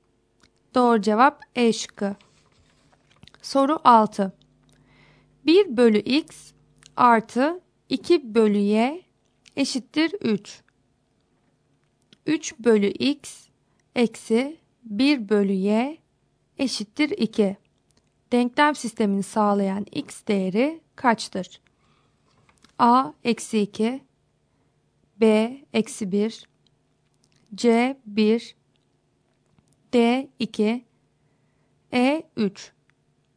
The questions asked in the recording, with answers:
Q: Denklem sistemini sağlayan x değeri kaçtır?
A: Doğru cevap C şıkkı.